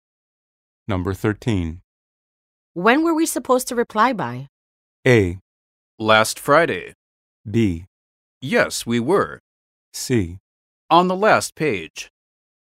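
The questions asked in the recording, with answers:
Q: When were we supposed to reply by?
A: A: Last Friday.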